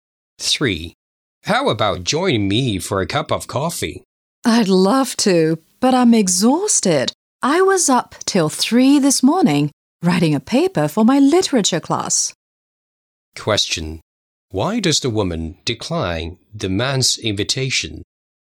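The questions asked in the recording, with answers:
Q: Why does the woman decline the man's invitation?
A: She is exhausted after staying up till 3 writing a paper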